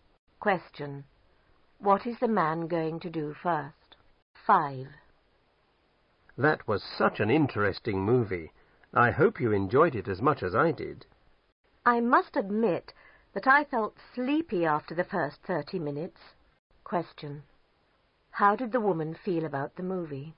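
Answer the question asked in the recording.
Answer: She found it boring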